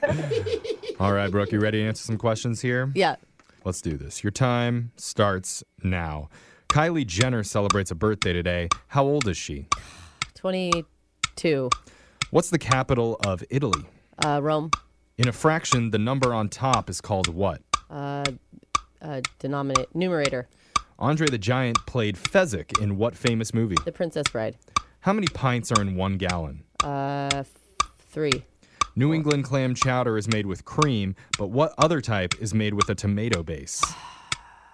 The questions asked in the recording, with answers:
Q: What's the capital of Italy?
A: The capital of Italy is Rome.

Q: In a fraction, the number on top is called what?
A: In a fraction, the number on top is the numerator.

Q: Andre the Giant played Fezzik in what famous movie?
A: Andre the Giant played Fezzik in the movie The Princess Bride.